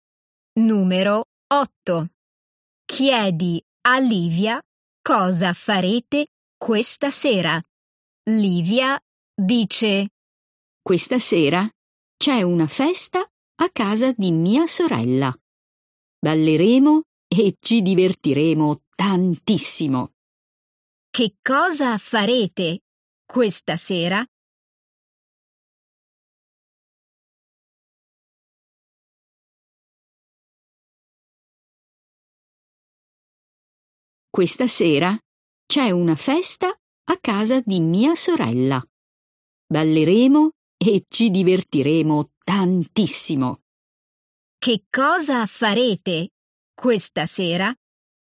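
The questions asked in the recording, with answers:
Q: Che cosa farete questa sera?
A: Andrete a una festa a casa della sorella di Livia e ballerete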